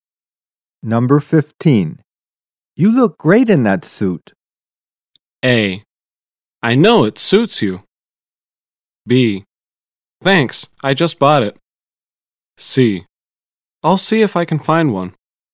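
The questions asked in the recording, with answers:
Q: You look great in that suit.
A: B: Thanks, I just bought it.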